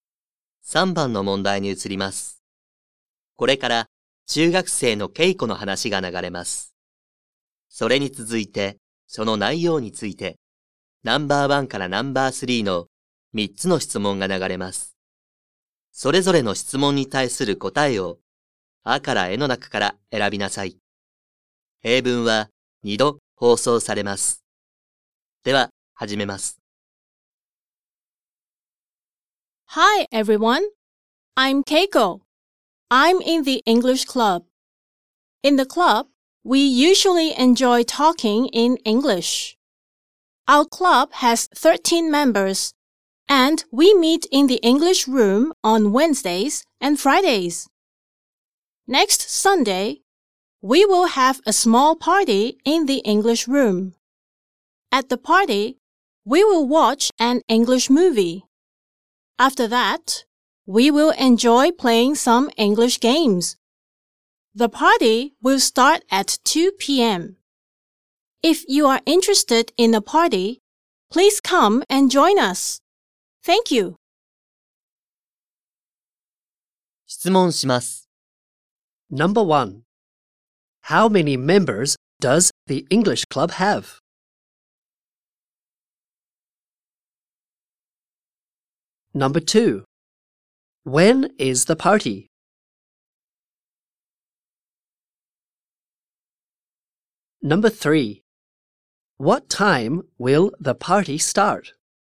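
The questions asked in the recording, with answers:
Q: How many members does the English club have?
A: 13 members.

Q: When is the party?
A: Next Sunday.

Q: What time will the party start?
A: At 2 p.m.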